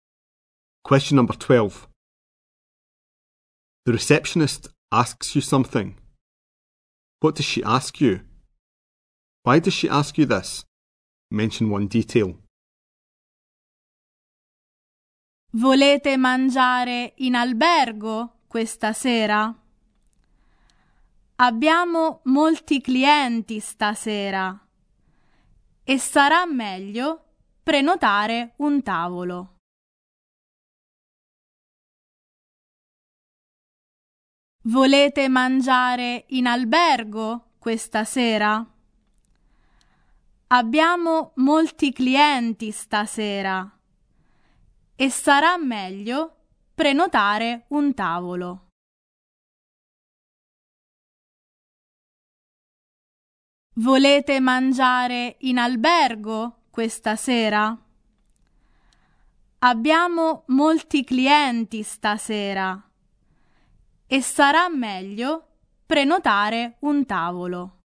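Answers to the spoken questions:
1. Whether you want to eat in the hotel this evening
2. There are many guests tonight so it is better to book a table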